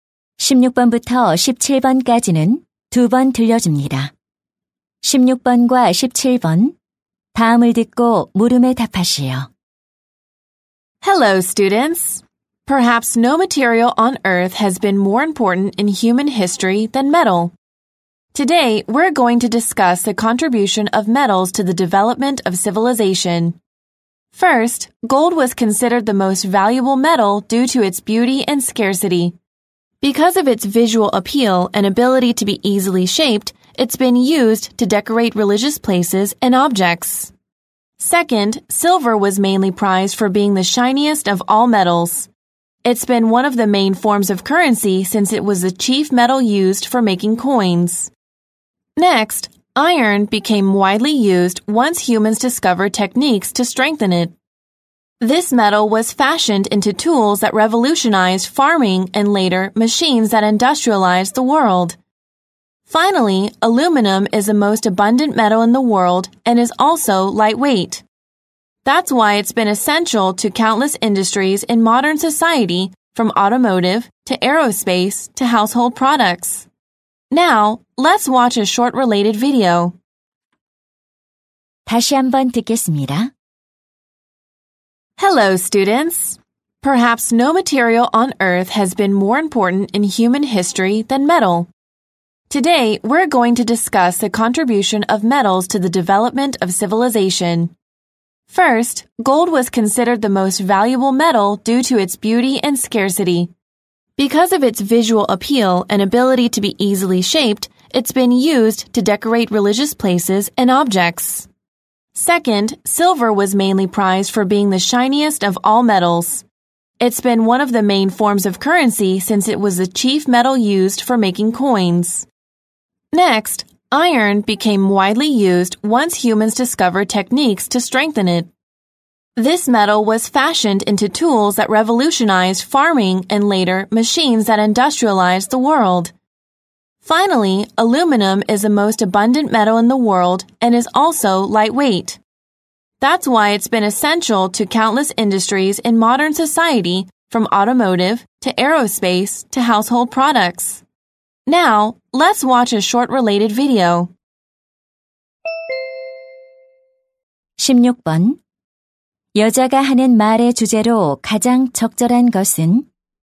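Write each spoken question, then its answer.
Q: 여자가 하는 말의 주제로 가장 적절한 것은?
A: 문명 발달에 대한 금속의 기여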